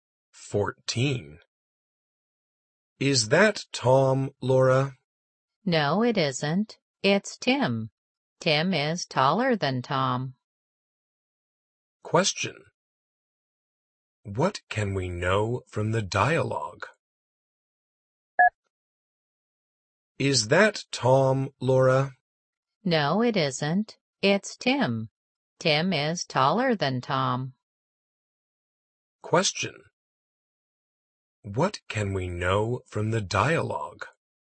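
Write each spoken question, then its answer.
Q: What can we know from the dialogue?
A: Tim is taller than Tom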